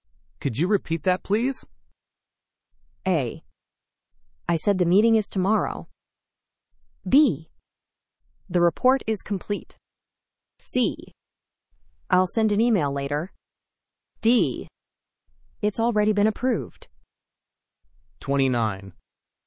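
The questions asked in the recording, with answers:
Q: Could you repeat that, please?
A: A: I said the meeting is tomorrow.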